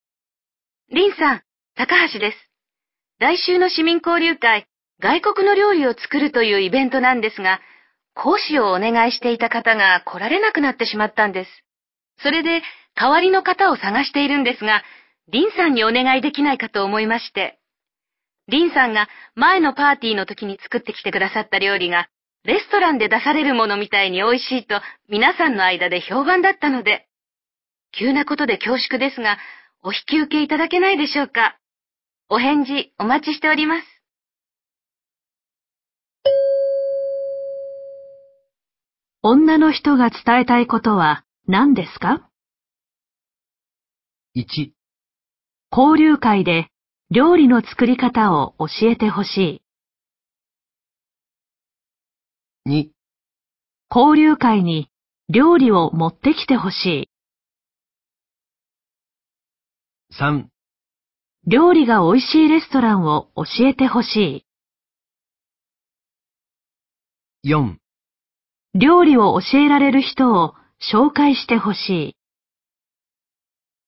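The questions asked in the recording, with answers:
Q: 女の人が伝えたいことは何ですか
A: 1: 交流会で料理の作り方を教えてほしい。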